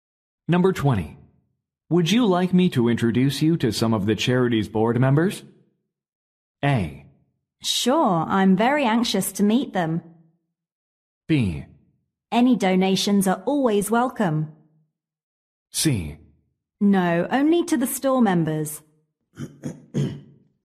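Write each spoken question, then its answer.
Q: Would you like me to introduce you to some of the charity's board members?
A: A: Sure, I'm very anxious to meet them.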